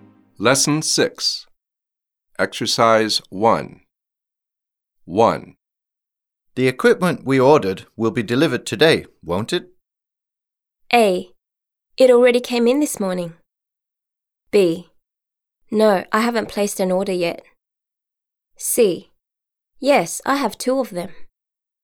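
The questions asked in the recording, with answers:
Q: The equipment we ordered will be delivered today, won't it?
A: A: It already came in this morning.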